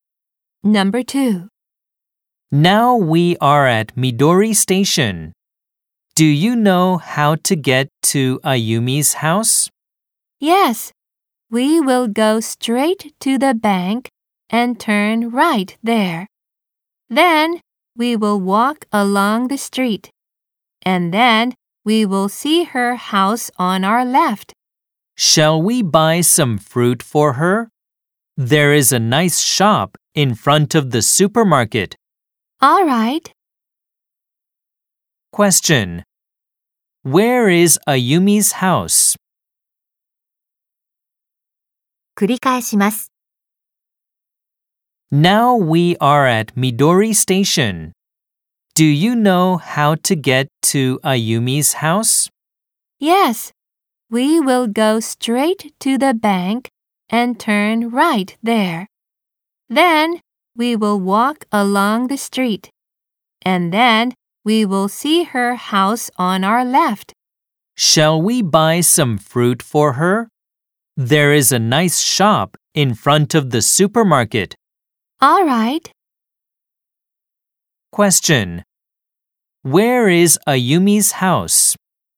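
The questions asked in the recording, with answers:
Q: Where is Ayumi's house?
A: Go straight to the bank, turn right, walk along the street; it is on the left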